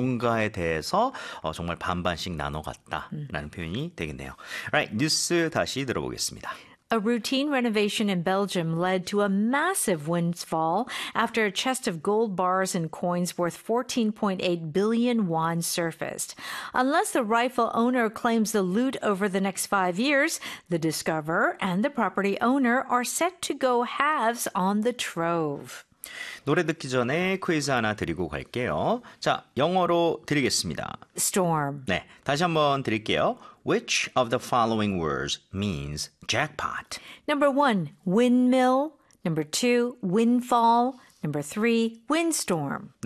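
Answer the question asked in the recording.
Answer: 2: windfall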